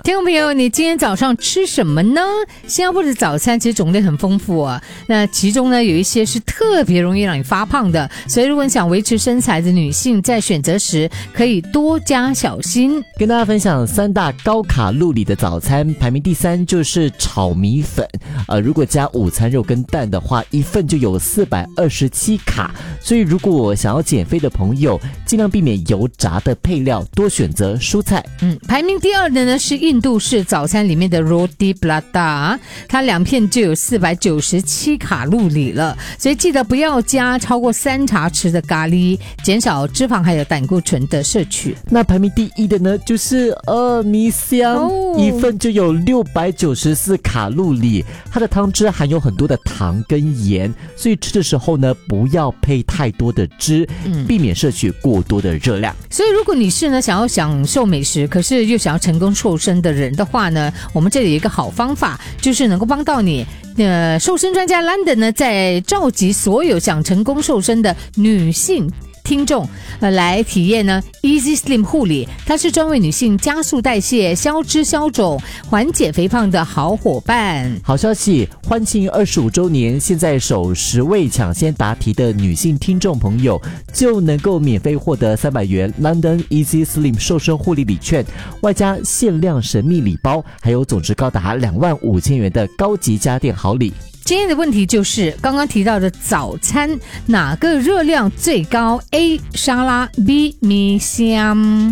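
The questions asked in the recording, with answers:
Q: 今天的问题就是刚刚提到的早餐哪个热量最高, A 沙拉, B 米香,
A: B: 米香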